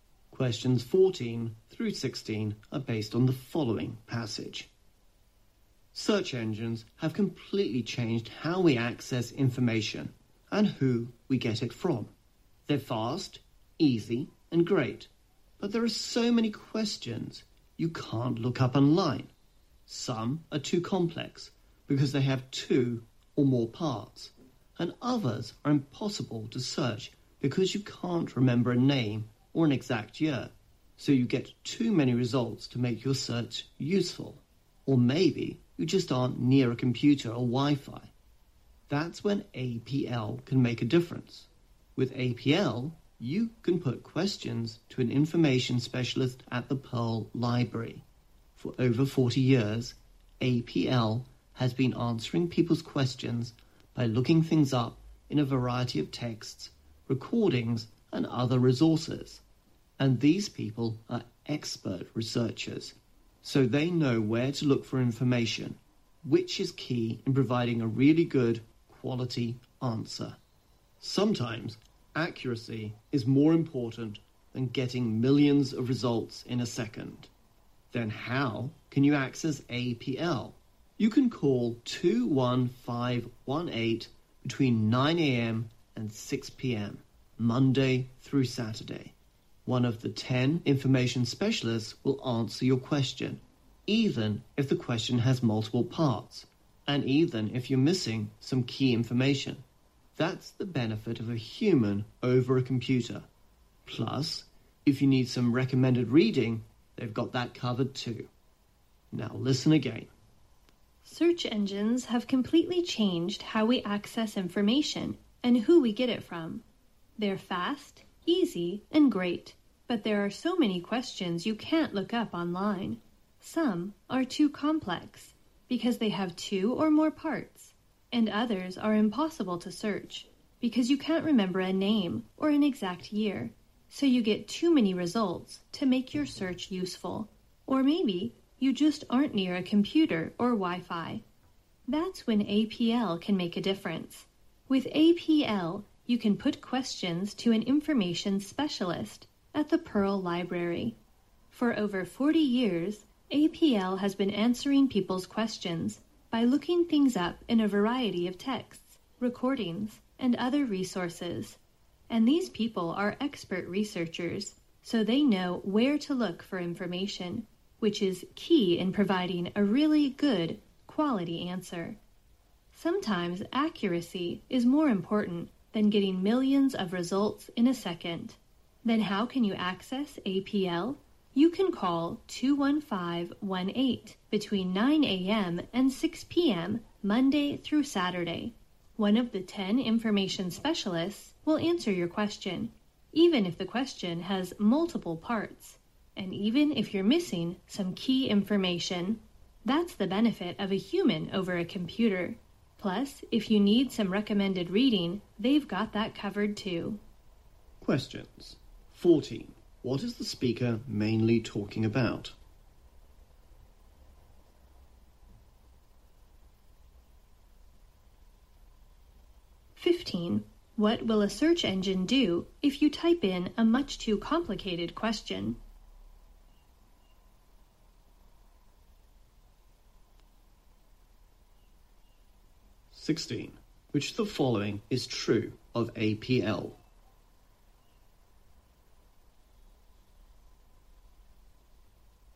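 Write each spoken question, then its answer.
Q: What is the speaker mainly talking about?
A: APL, a library service that answers questions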